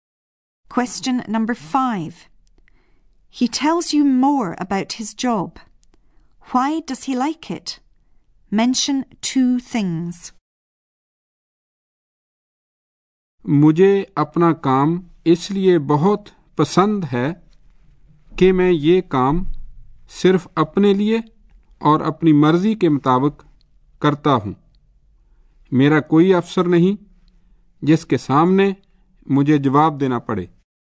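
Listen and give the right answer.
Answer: He works for himself and as he pleases; he has no boss to answer to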